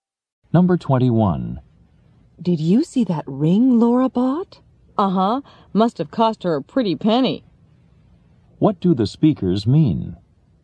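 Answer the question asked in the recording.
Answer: The ring was very expensive.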